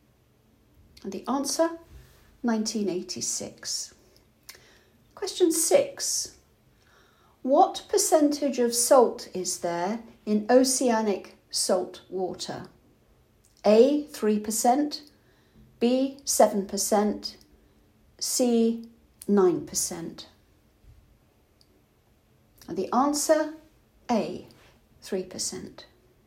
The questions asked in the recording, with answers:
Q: What percentage of salt is there in oceanic salt water?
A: A, 3%.